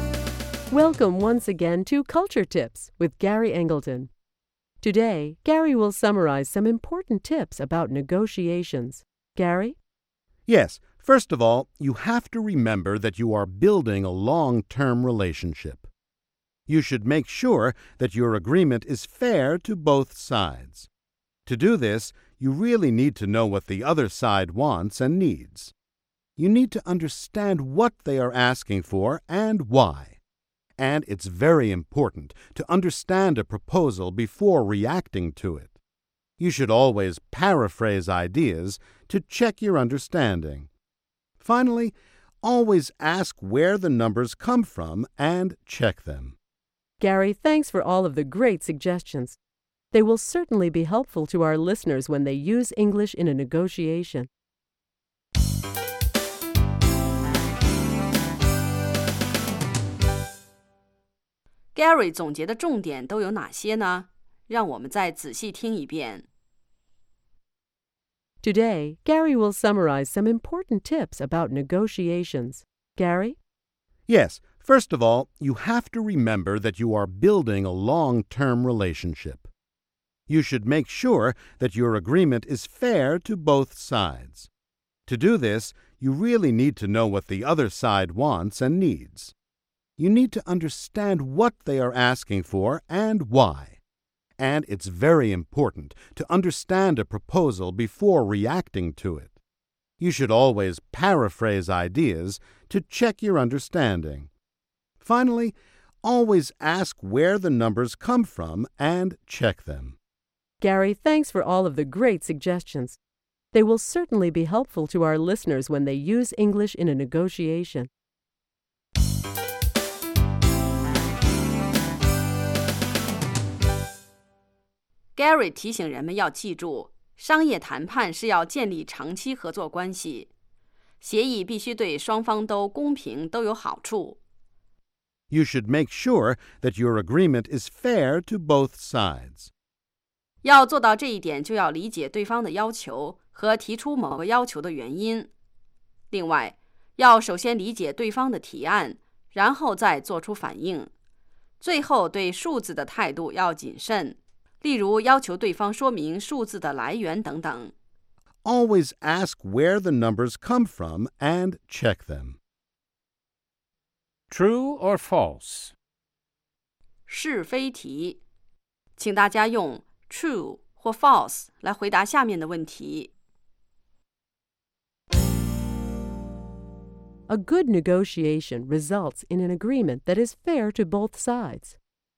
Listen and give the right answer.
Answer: True. Negotiation can lead to a win-win situation.